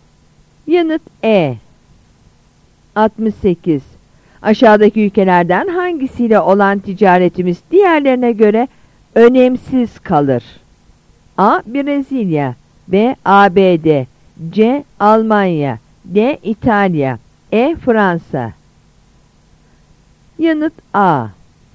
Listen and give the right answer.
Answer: Yanıt A.